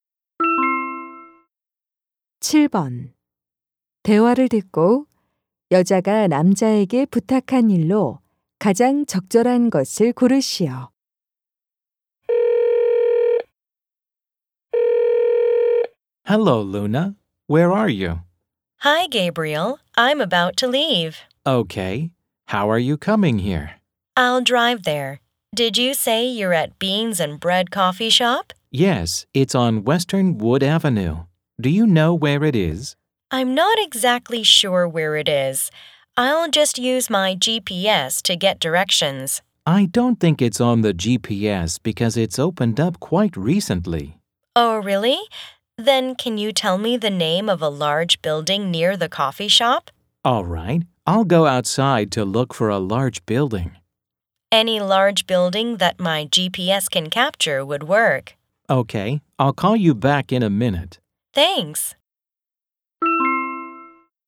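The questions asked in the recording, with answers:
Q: 대화를 듣고 여자가 남자에게 부탁한 일로 가장 적절한 것을 고르시오.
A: 커피숍 근처의 큰 건물 이름 알려 주기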